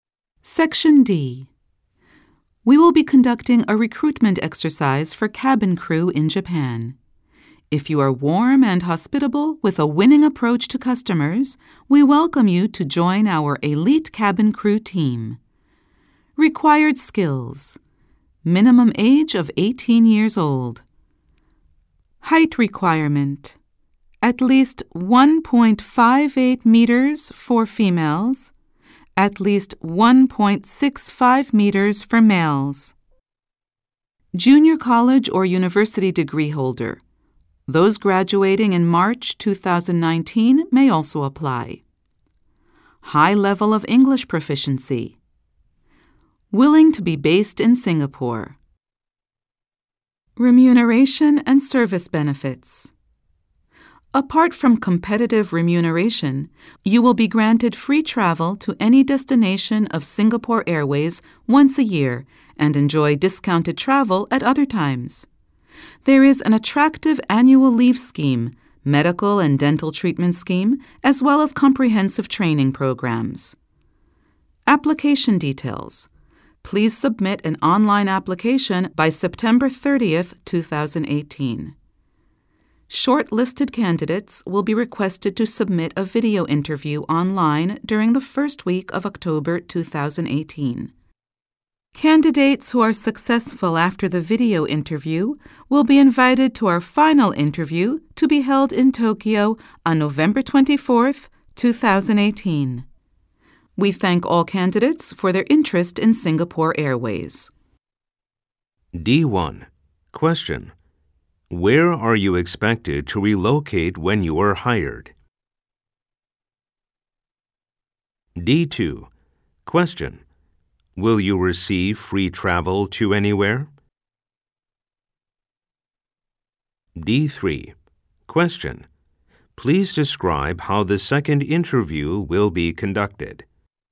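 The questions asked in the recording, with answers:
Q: Where are you expected to relocate when you are hired?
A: Singapore

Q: Will you receive free travel to anywhere?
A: No, only to Singapore Airways destinations, once a year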